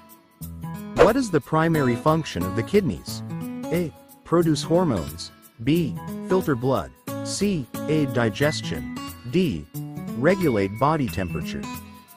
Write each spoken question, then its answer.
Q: What is the primary function of the kidneys?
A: The answer is B. Filter blood.